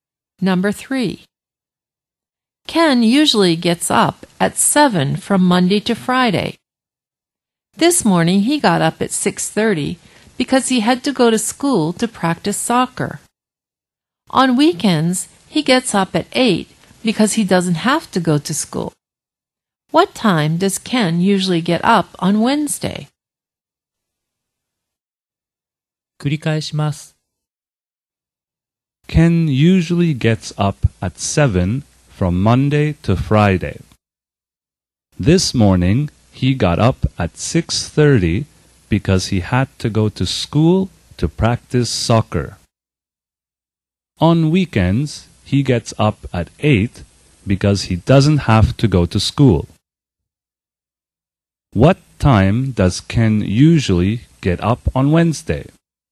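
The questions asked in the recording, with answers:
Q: What time does Ken usually get up on Wednesday?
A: At 7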